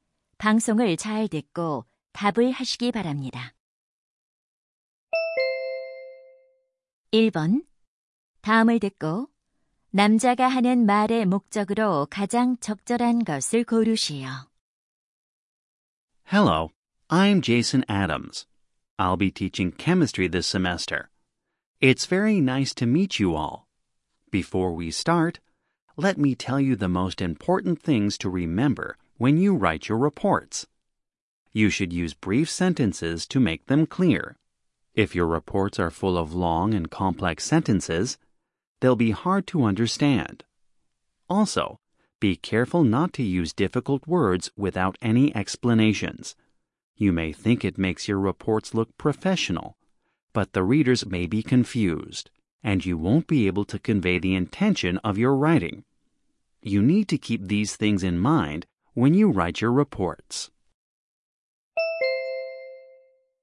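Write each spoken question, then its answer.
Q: 다음을 듣고 남자가 하는 말의 목적으로 가장 적절한 것을 고르시오.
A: 보고서를 쓸 때 짧은 문장과 쉬운 단어를 사용하라고 당부하려고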